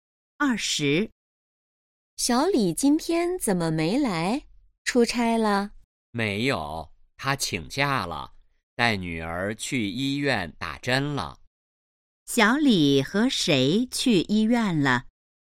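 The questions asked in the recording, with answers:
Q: 小李和谁去医院了?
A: 女儿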